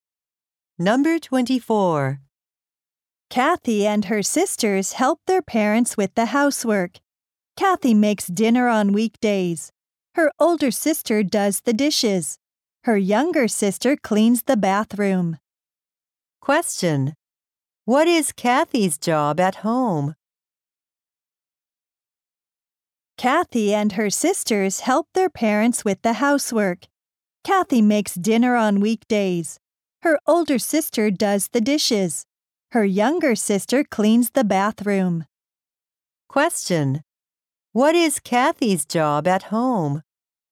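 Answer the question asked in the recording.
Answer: Making dinner on weekdays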